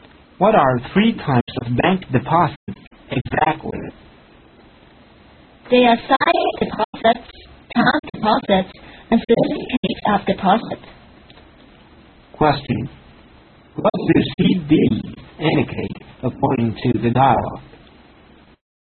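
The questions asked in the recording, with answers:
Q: What do CD indicate according to the dialogue?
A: Certificates of deposit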